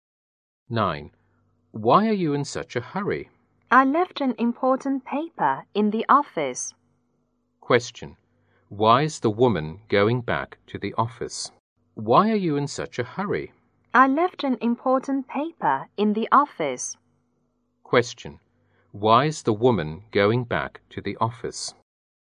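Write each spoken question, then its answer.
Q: Why is the woman going back to the office?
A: She left an important paper there.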